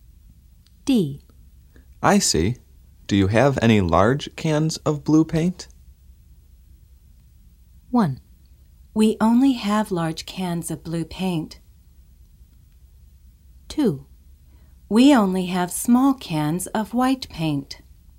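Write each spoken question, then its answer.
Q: I see. Do you have any large cans of blue paint?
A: 2: We only have small cans of white paint.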